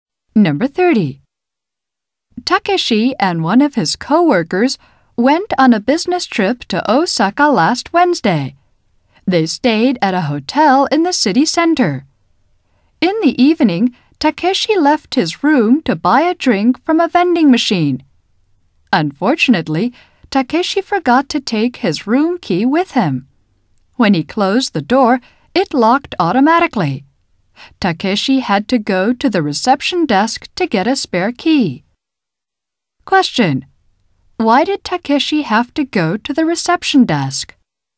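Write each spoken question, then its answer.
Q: Why did Takeshi have to go to the reception desk?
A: He locked himself out because he forgot his room key.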